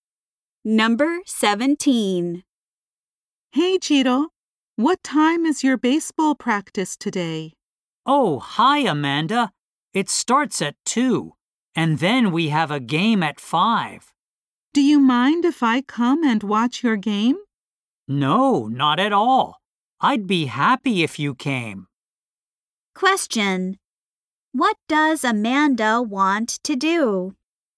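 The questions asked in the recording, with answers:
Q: What does Amanda want to do?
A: Watch Chito's baseball game.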